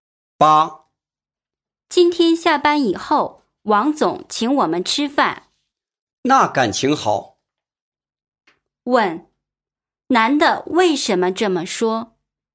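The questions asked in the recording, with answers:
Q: 问,男的为什么这么说?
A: 王总请吃饭,他很高兴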